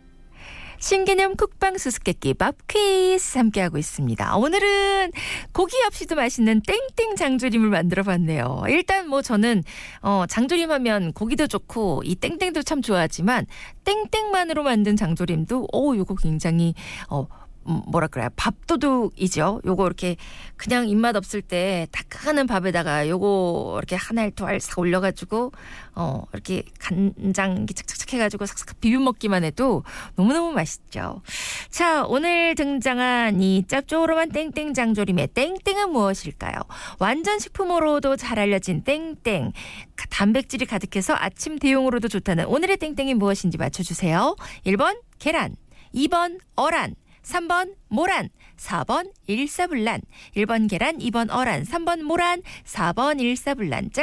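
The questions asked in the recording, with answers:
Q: 자, 오늘 등장한 이 짭조름한 땡땡 장조림의 땡땡은 무엇일까요?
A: 1: 계란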